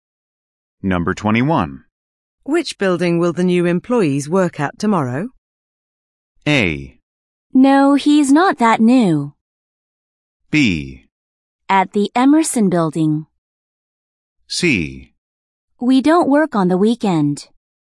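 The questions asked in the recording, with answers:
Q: Which building will the new employees work at tomorrow?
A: B: At the Emerson Building.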